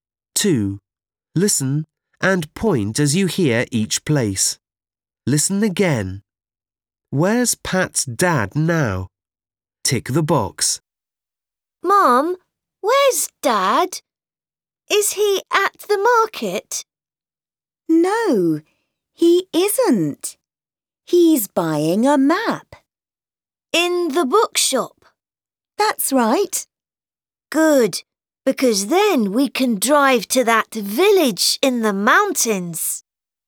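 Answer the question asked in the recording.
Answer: In the bookshop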